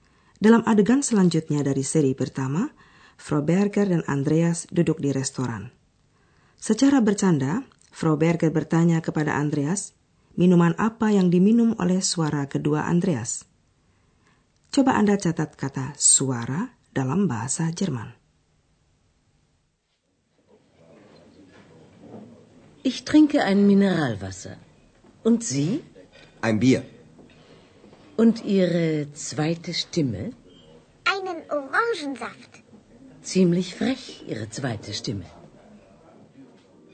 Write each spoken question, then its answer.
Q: Coba Anda catat kata suara dalam bahasa Jerman.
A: Kata itu ialah Stimme.